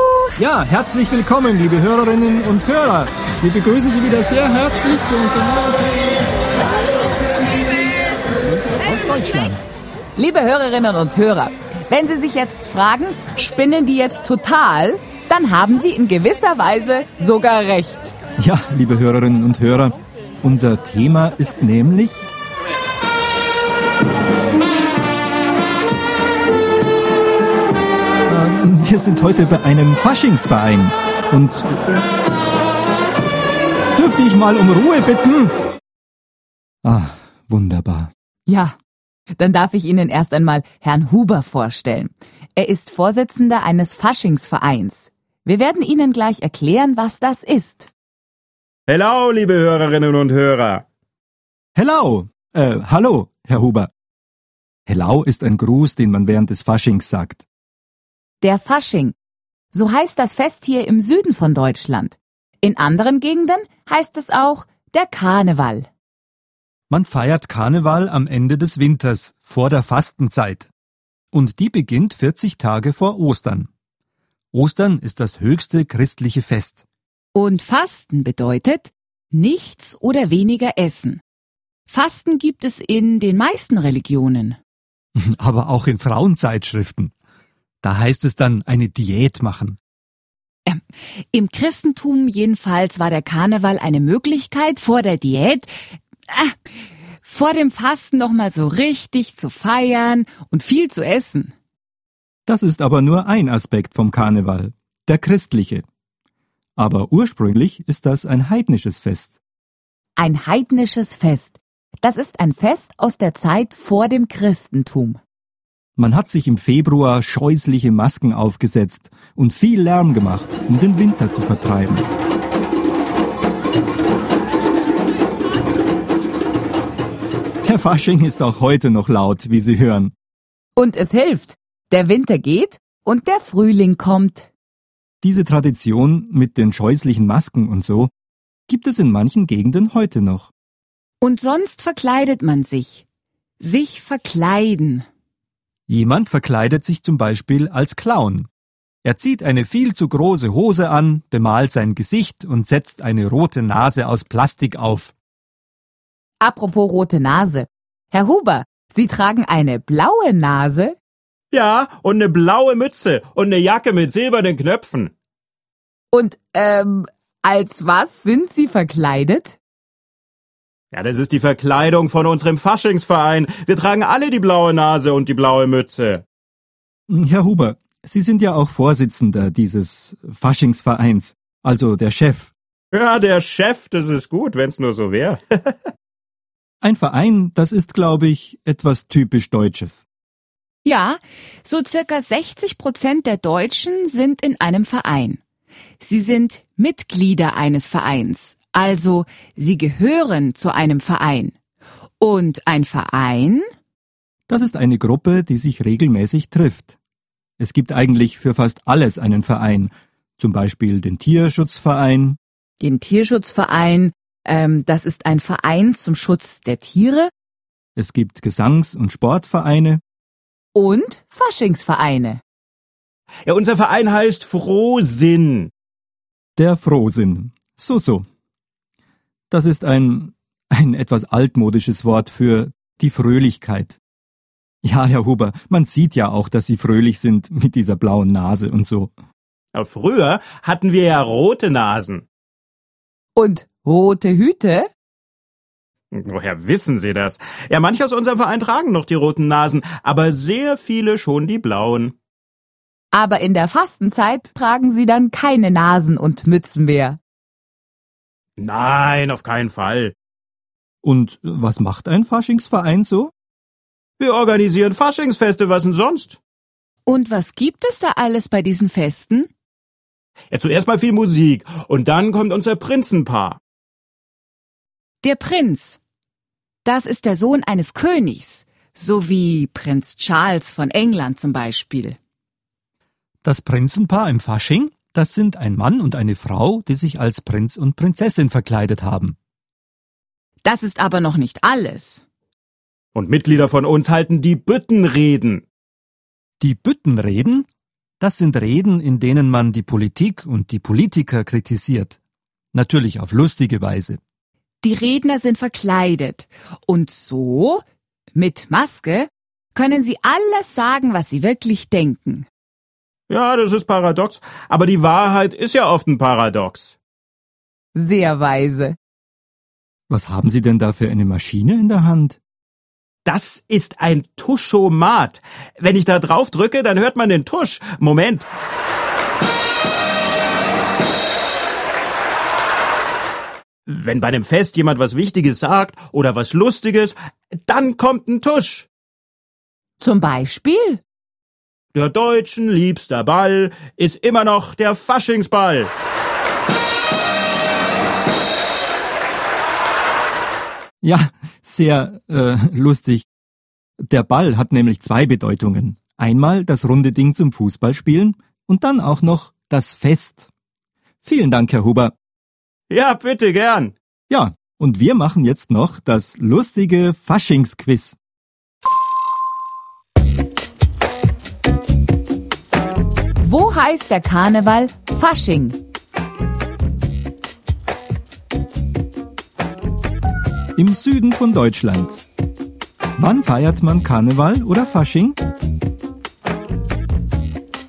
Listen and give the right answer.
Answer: Im Februar oder am Ende des Winters, vor der Fastenzeit.